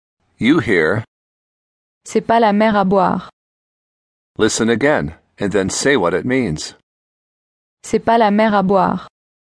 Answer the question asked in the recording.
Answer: It's not a big deal.